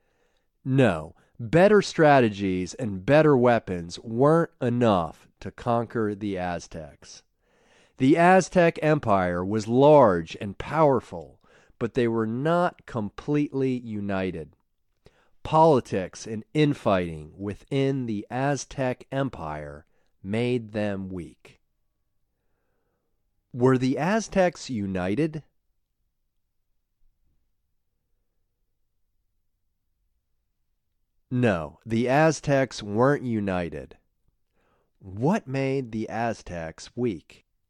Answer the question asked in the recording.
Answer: Politics and infighting within the Aztec Empire made them weak.